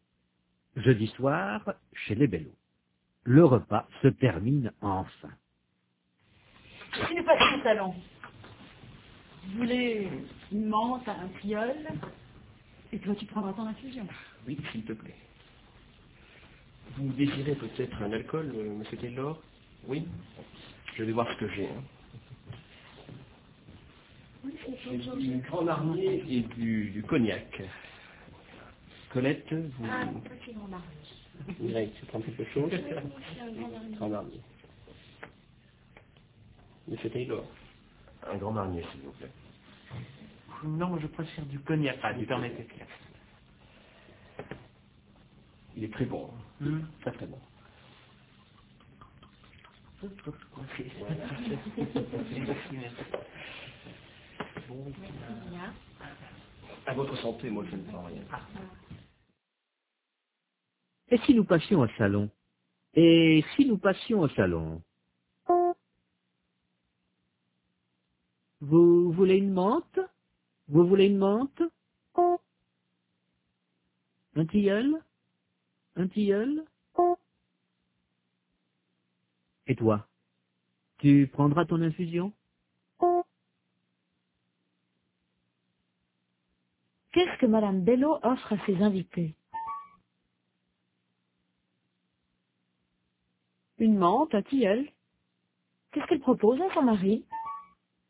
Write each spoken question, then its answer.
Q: Qu'est-ce que Madame Bello offre à ses invités?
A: Une menthe, un tilleul.

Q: Qu'est-ce qu'elle propose à son mari?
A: Son infusion.